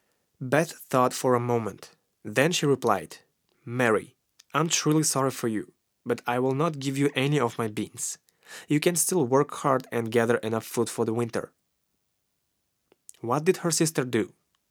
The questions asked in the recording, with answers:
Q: What did her sister do?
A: She thought for a moment.